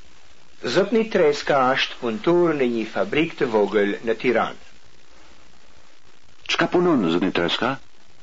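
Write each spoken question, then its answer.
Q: Çka punon zëpni treska?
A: Është punëtor në një fabrikë të vogël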